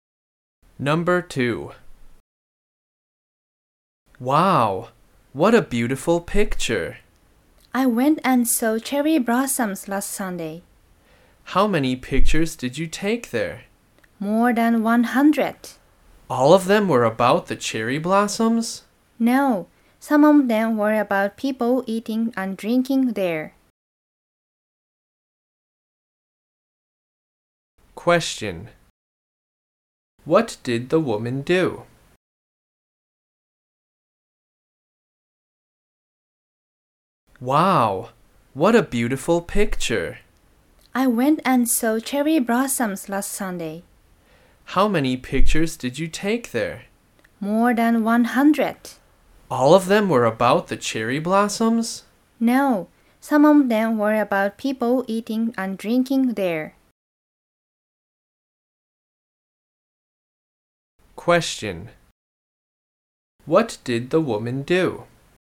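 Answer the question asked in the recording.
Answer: She went to see cherry blossoms and took more than 100 pictures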